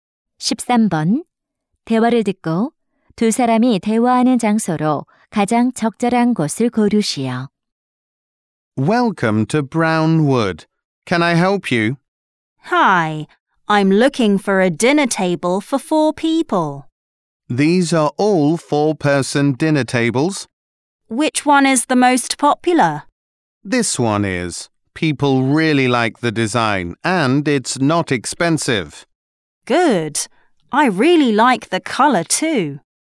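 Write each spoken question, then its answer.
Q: 대화를 듣고 두 사람이 대화하는 장소로 가장 적절한 곳을 고르시오.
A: 가구점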